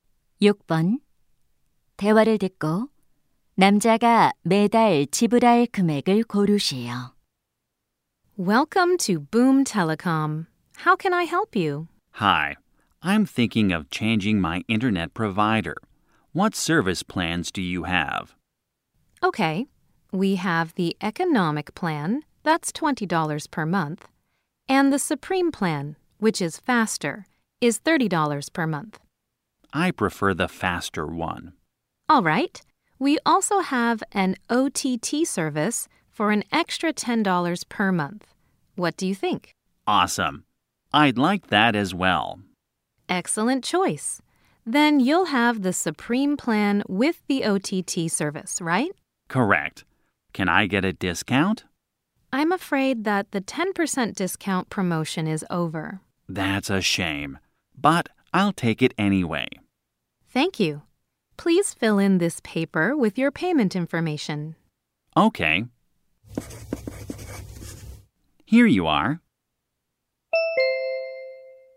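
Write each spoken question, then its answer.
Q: 대화를 듣고 남자가 매달 지불할 금액을 고르시오.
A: 40달러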